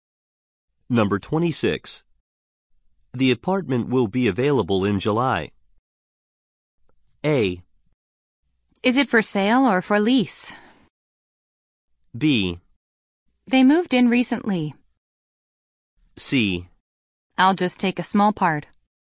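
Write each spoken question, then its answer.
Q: The apartment will be available in July.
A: A: Is it for sale or for lease?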